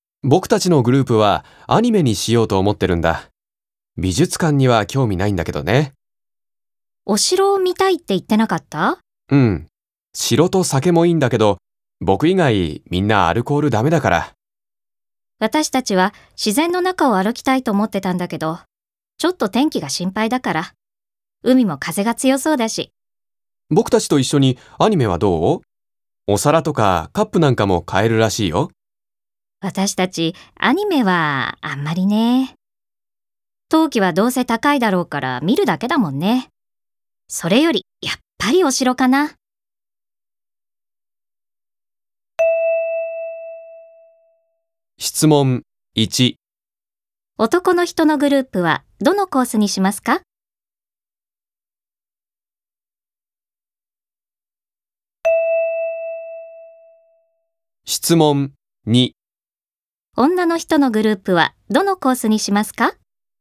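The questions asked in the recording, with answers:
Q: 男の人のグループはどのコースにしますか?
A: アニメのコース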